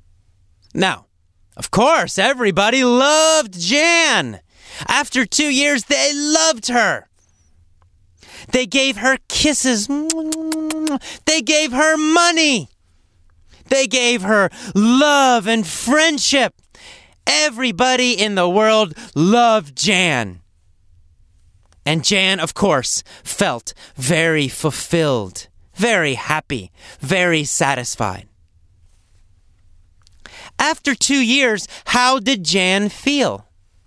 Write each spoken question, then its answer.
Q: After 2 years, how did Jan feel?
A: She felt fulfilled. She felt satisfied and very, very happy.